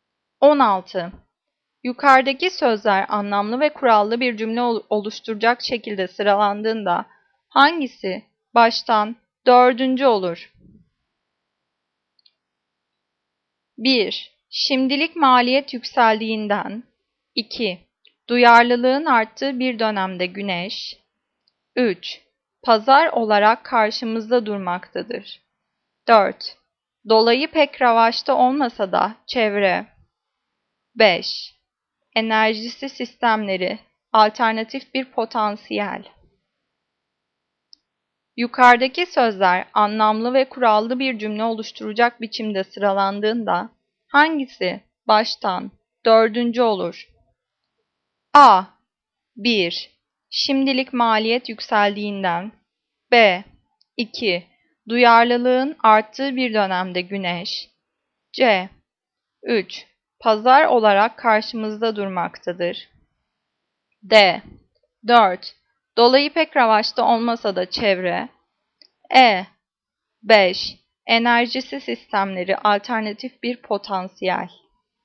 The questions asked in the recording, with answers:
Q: Yukarıdaki sözler anlamlı ve kurallı bir cümle oluşturacak biçimde sıralandığında hangisi baştan dördüncü olur?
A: Cevap E. 5. Enerjisi sistemleri alternatif bir potansiyel.